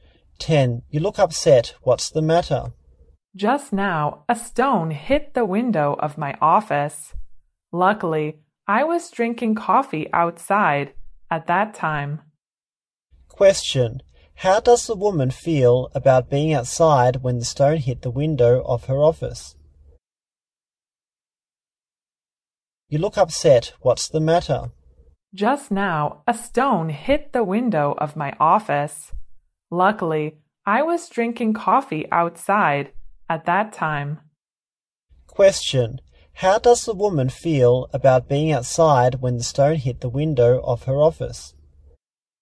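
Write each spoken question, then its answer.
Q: How does the woman feel about being outside when the stone hit the window of her office?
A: Lucky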